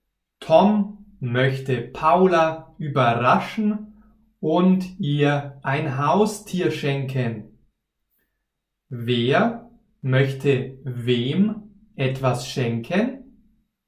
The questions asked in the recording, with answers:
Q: Wer möchte wem etwas schenken?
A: Tom möchte Paula etwas schenken.